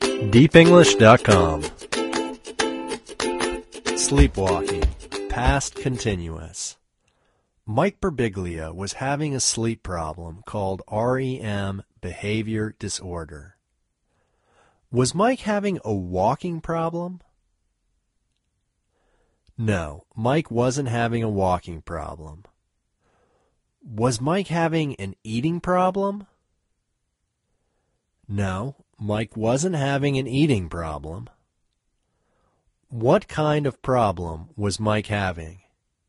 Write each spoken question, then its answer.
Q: Was Mike having a walking problem?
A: No, Mike wasn't having a walking problem.

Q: What kind of problem was Mike having?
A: Mike was having a sleep problem.